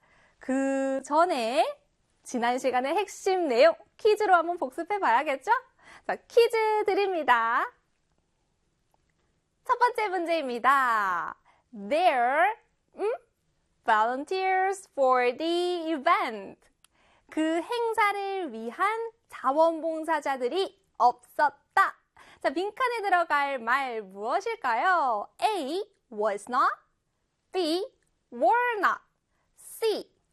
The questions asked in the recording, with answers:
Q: 자, 빈칸에 들어갈 말 무엇일까요?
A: B의 were not입니다.